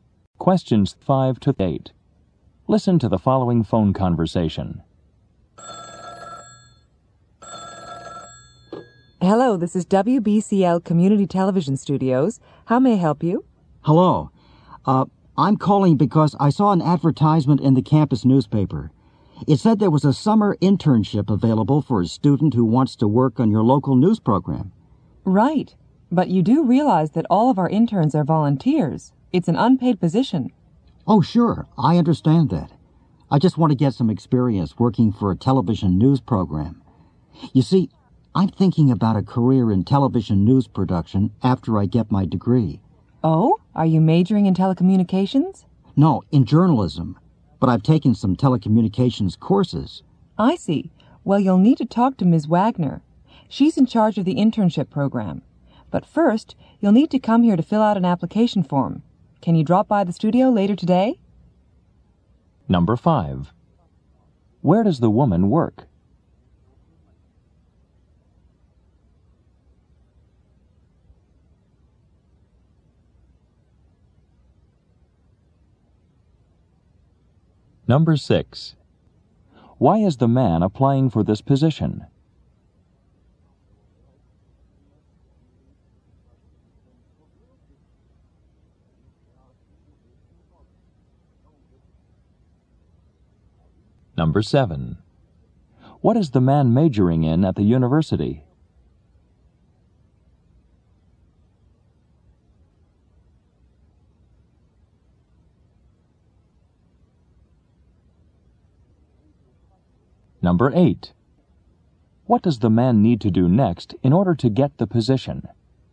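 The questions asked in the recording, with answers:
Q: Where does the woman work?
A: At a community television studio.

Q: Why is the man applying for this position?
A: To get experience working for a TV news program.

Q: What is the man majoring in at the university?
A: Journalism.

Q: What does the man need to do next in order to get the position?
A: Go to the studio to fill out an application form.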